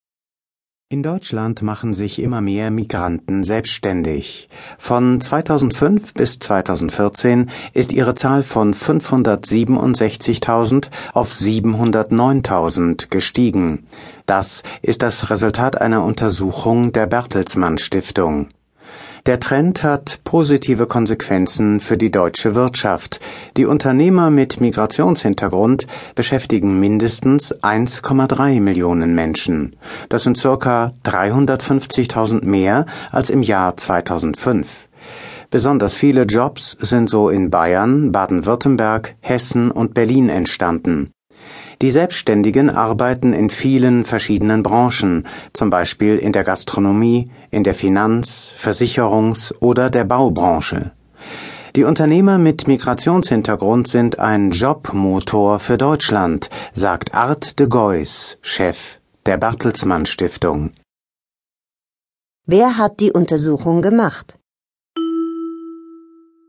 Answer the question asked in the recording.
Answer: Die Bertelsmann Stiftung